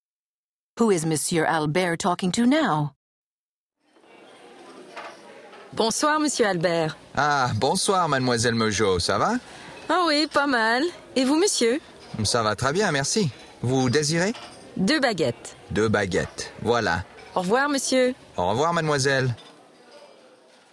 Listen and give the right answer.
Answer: This time it was Mademoiselle Mojo who came into the shop to buy fresh bread to accompany the evening meal.